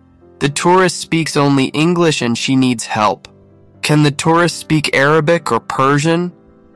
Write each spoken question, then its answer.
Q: Can the tourist speak Arabic or Persian?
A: No, she can't. She only speaks English.